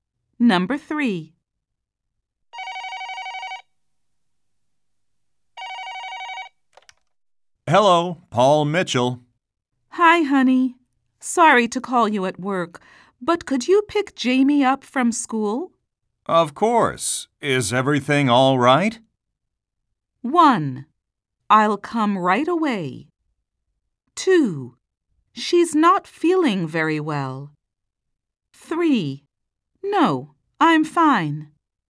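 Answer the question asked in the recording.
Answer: 2: She's not feeling very well.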